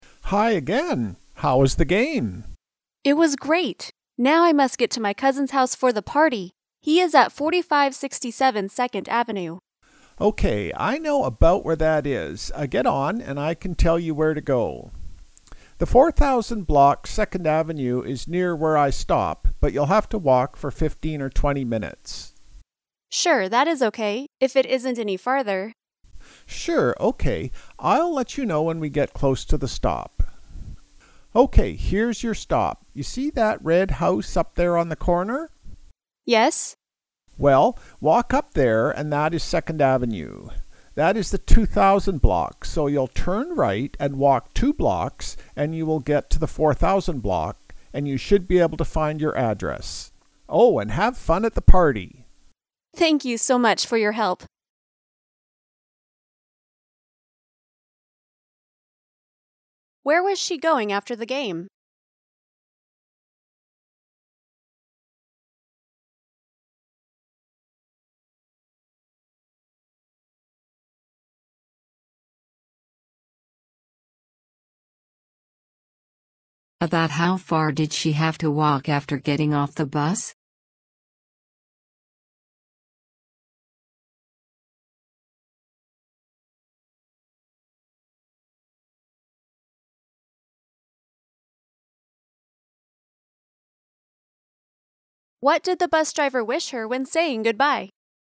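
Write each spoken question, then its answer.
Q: Where was she going after the game?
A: To her cousin's house for a party

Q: About how far did she have to walk after getting off the bus?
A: 15 or 20 minutes (two blocks)

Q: What did the bus driver wish her when saying goodbye?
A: To have fun at the party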